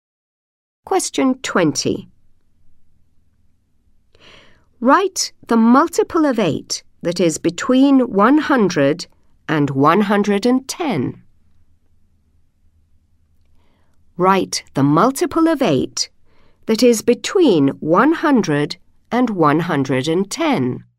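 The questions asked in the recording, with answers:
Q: Write the multiple of 8 that is between 100 and 110.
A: 104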